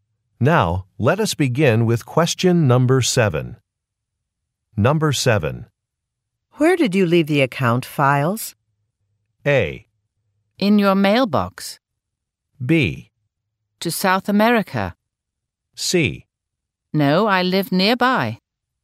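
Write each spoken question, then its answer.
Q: Where did you leave the account files?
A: A: In your mailbox.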